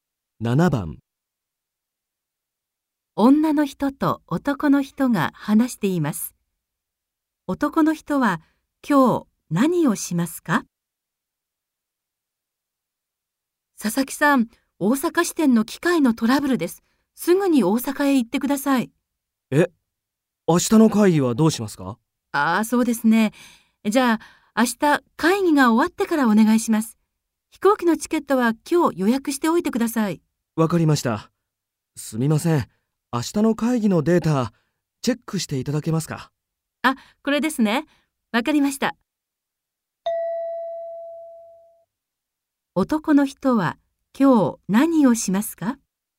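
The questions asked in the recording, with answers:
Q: 男の人は今日何をしますか?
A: 飛行機のチケットを予約する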